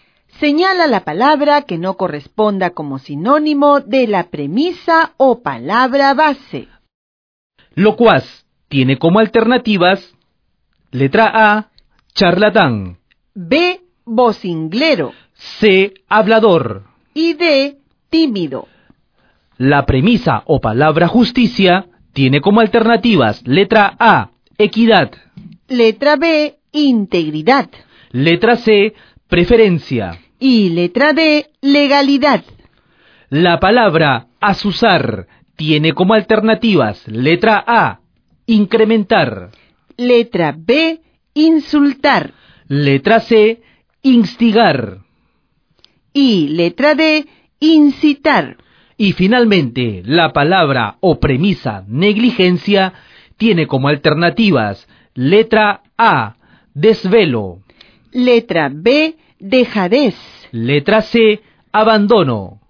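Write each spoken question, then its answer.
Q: Locuaz tiene como alternativas letra A, charlatán.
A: D: tímido

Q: La premisa o palabra justicia tiene como alternativas letra A, equidad.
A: C: preferencia

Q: Y finalmente, la palabra o premisa negligencia tiene como alternativas letra A, desvelo.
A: A: desvelo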